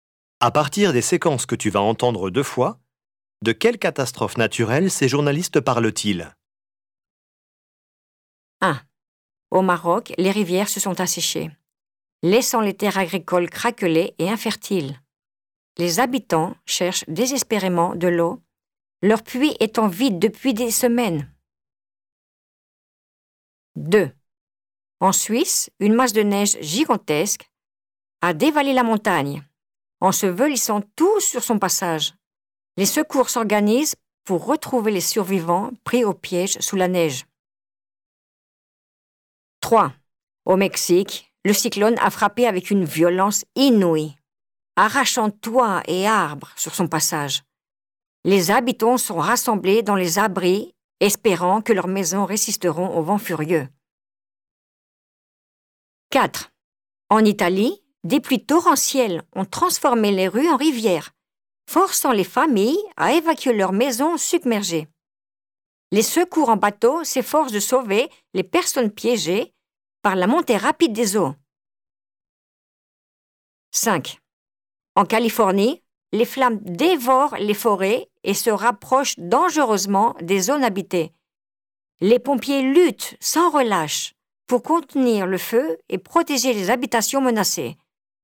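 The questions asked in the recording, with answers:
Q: de quelle catastrophe naturelle ces journalistes parlent-ils?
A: une sécheresse

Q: de quelle catastrophe naturelle ces journalistes parlent-ils?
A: une avalanche

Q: de quelle catastrophe naturelle ces journalistes parlent-ils?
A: un cyclone (ouragan)

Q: de quelle catastrophe naturelle ces journalistes parlent-ils?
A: une inondation

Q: de quelle catastrophe naturelle ces journalistes parlent-ils?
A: un incendie de forêt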